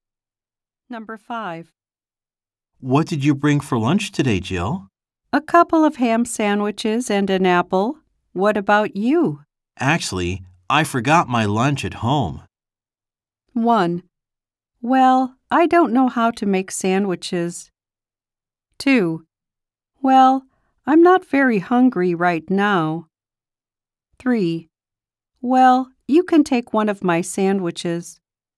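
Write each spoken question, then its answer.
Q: Actually, I forgot my lunch at home.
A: 3: Well, you can take one of my sandwiches.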